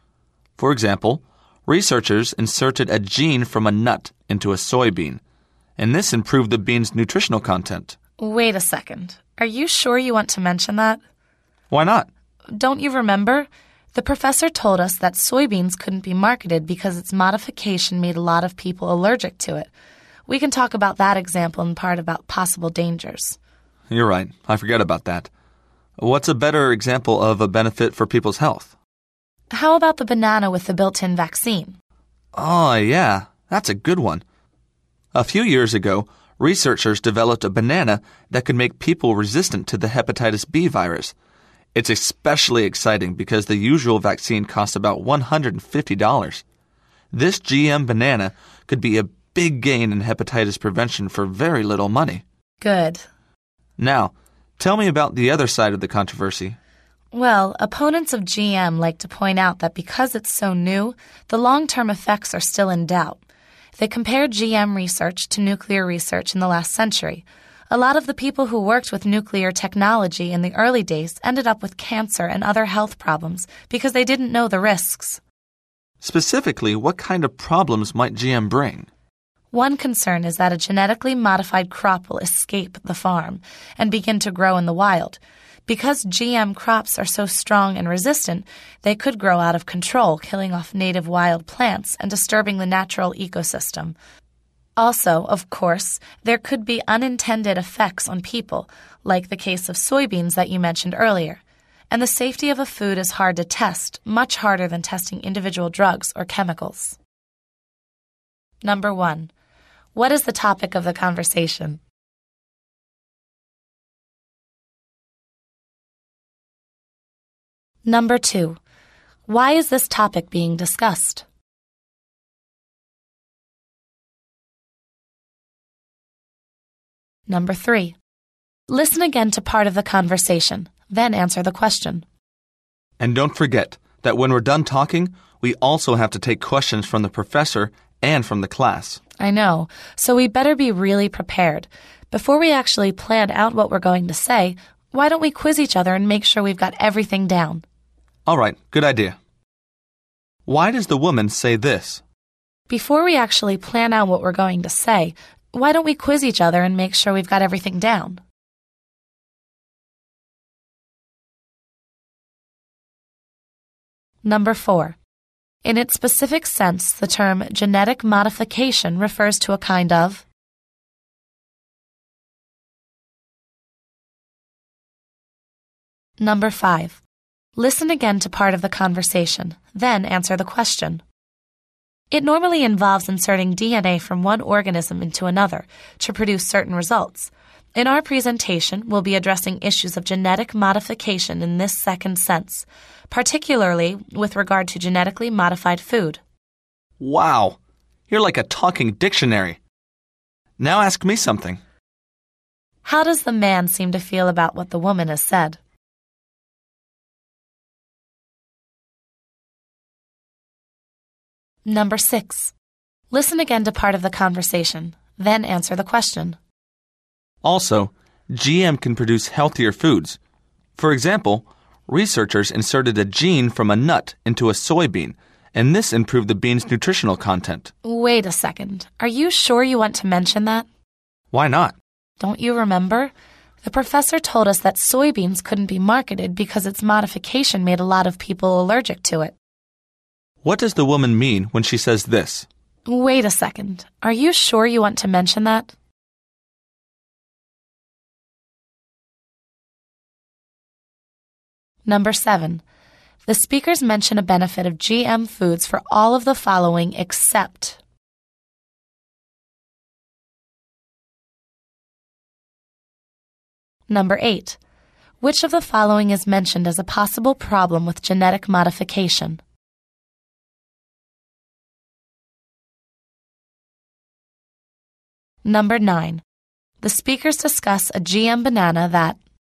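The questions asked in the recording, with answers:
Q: What does the woman mean when she says this?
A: The soybean example is a bad one to use as a health benefit, because the modification made people allergic

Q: Number 9. The speakers discuss a GM banana that...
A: could make people resistant to the hepatitis B virus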